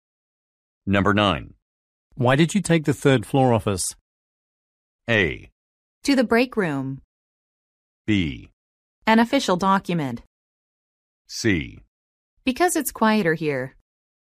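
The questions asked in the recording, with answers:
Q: Why did you take the third floor office?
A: C: Because it's quieter here.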